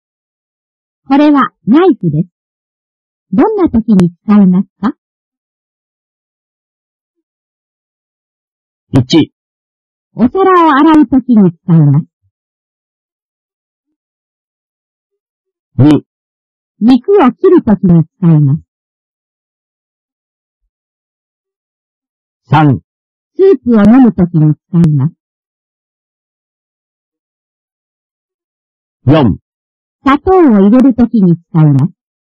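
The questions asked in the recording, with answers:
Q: これはナイフです。どんな時に使いますか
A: 2: 肉を切る時に使います。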